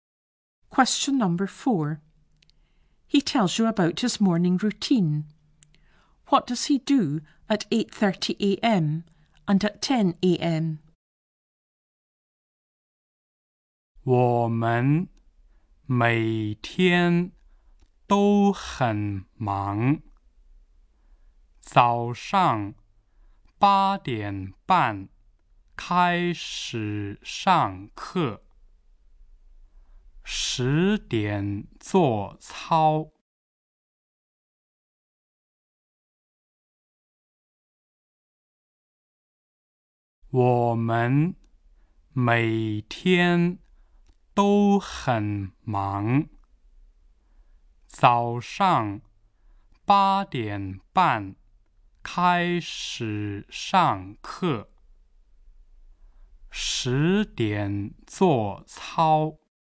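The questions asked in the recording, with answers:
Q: What does he do at 8:30 a.m.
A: Classes start

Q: and at 10 a.m?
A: Exercises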